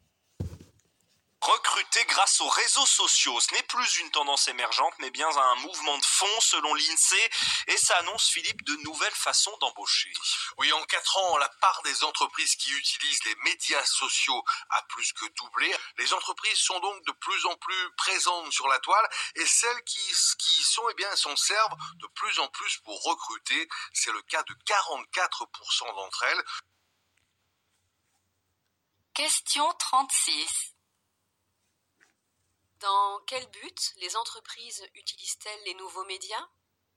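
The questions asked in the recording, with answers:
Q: Dans quel but les entreprises utilisent-elles les nouveaux médias ?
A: Pour recruter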